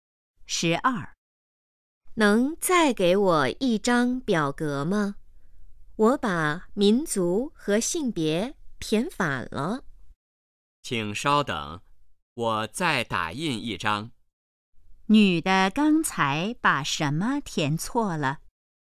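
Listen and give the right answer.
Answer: 民族和性别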